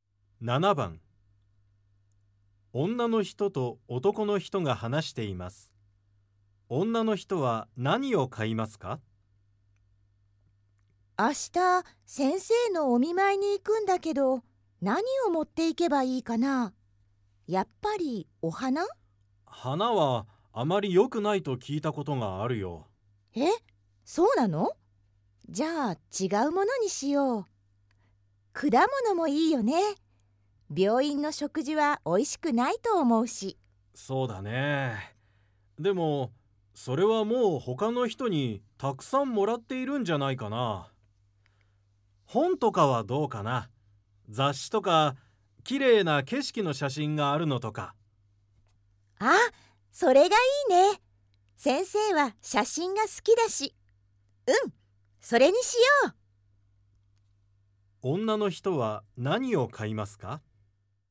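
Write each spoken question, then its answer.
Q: 女の人は何を買いますか?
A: 綺麗な景色の写真がある本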